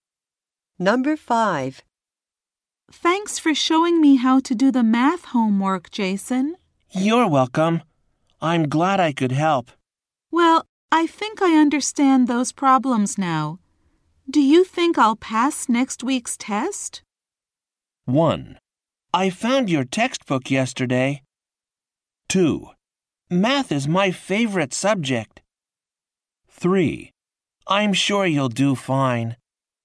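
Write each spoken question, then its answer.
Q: Do you think I'll pass next week's test?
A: 3: I'm sure you'll do fine.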